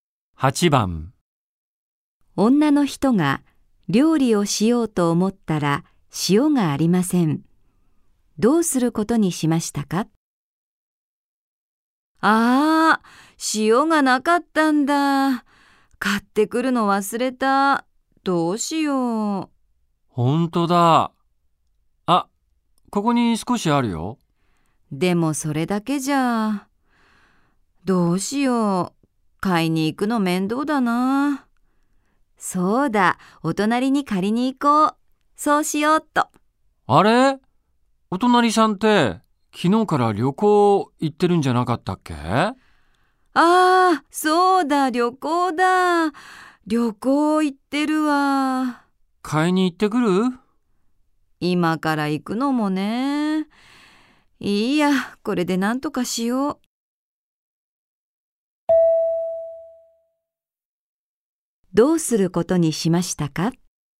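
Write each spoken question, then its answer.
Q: どうすることにしましたか?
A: 今ある少しの塩でなんとかする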